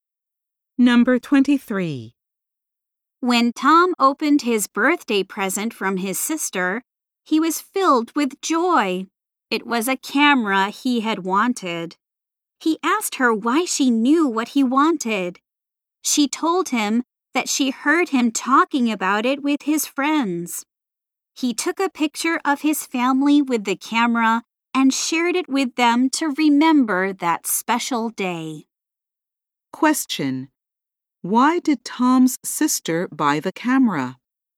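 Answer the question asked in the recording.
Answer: She heard him talking about it with his friends.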